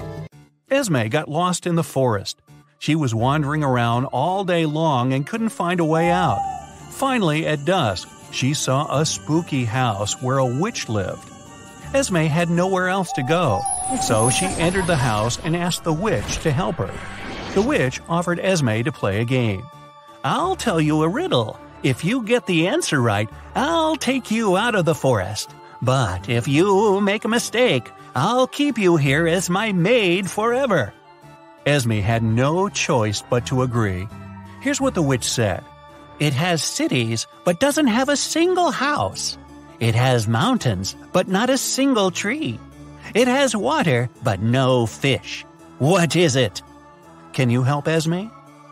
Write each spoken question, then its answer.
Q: What is it?" Can you help Esme?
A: It's a map.